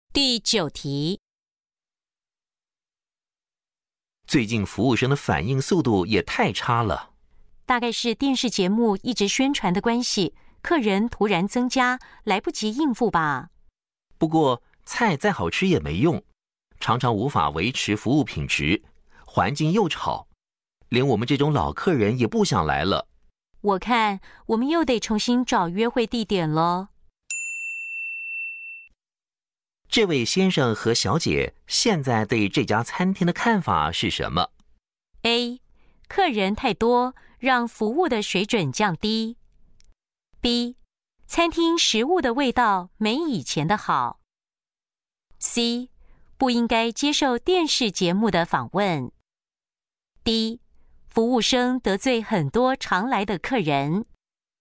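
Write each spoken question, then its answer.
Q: 这位先生和小姐现在对这家餐厅的看法是什么?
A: A: 客人太多,让服务的水准降低。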